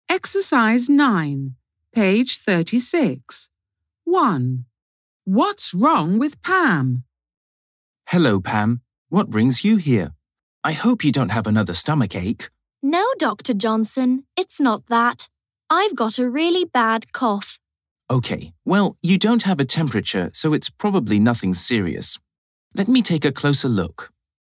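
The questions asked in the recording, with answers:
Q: What's wrong with Pam?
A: She has a bad cough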